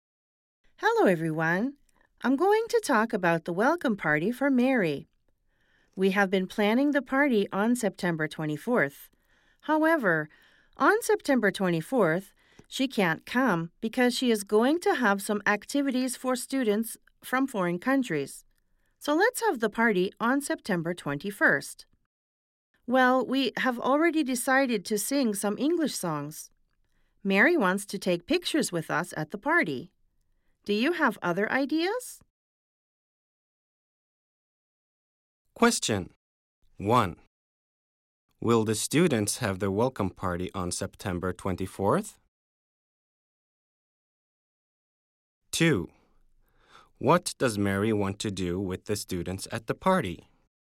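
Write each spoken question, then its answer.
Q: Will the students have their welcome party on September 24th?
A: No, they won't.

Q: What does Mary want to do with the students at the party?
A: She wants to take pictures with them.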